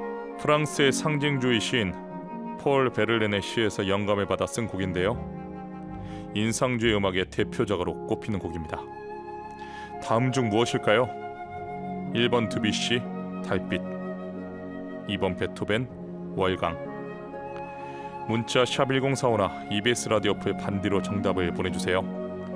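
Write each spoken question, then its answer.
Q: 다음 중 무엇일까요?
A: 1: 드뷔시 달빛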